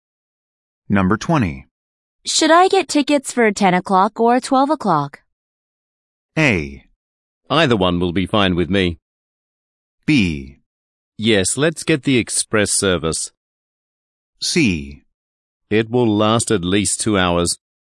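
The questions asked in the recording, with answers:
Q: Should I get tickets for 10 o'clock or 12 o'clock?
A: A: Either one will be fine with me.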